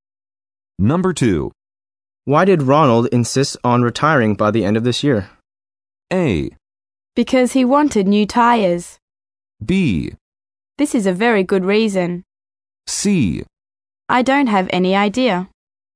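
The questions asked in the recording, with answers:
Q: Why did Ronald insist on retiring by the end of this year?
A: C: I don't have any idea.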